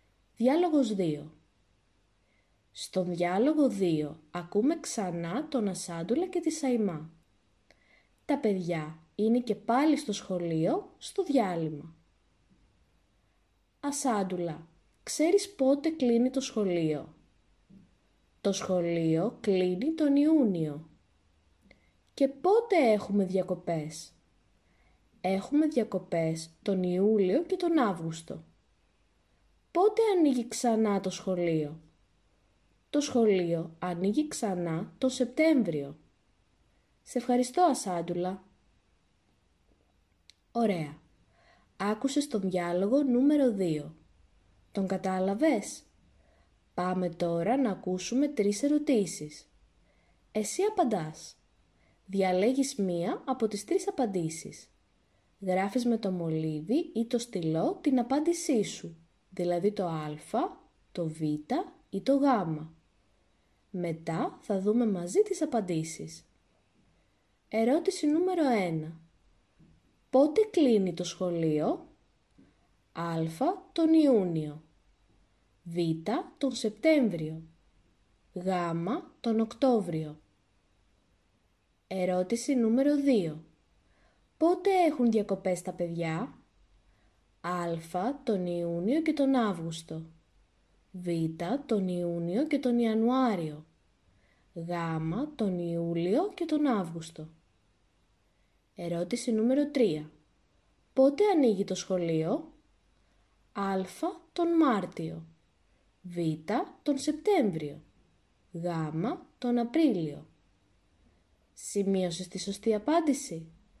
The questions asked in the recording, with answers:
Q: Πότε κλείνει το σχολείο?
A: Στην ερώτηση νούμερο 1, η σωστή απάντηση είναι το α.

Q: Πότε έχουν διακοπές τα παιδιά?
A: Στην ερώτηση νούμερο 2, η σωστή απάντηση είναι το γ.

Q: Πότε ανοίγει το σχολείο?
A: Στην ερώτηση νούμερο 3, η σωστή απάντηση είναι το Β.